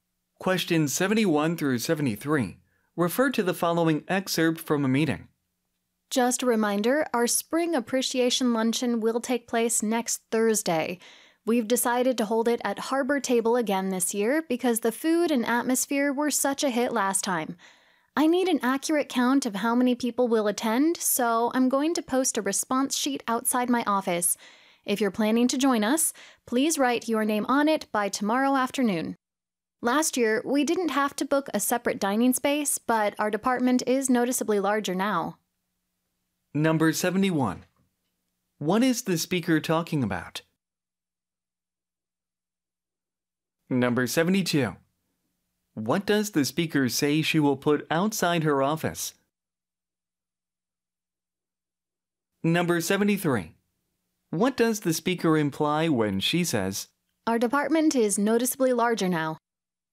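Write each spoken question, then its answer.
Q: What is the speaker talking about?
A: The spring appreciation luncheon next Thursday

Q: What does the speaker say she will put outside her office?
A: A response sheet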